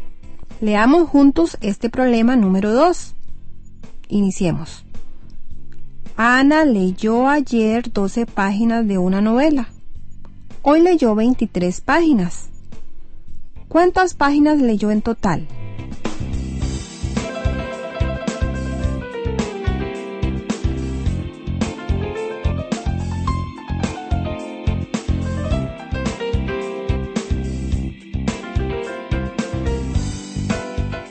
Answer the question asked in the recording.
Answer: Leyó en total 35 páginas.